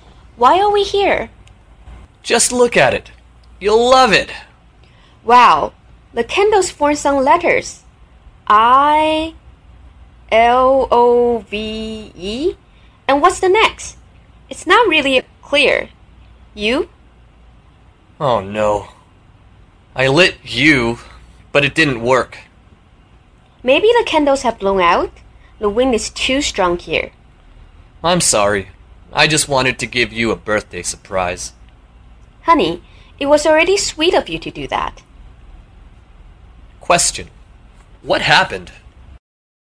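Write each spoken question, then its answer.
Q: What happened?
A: The wind blew out the candles of a birthday surprise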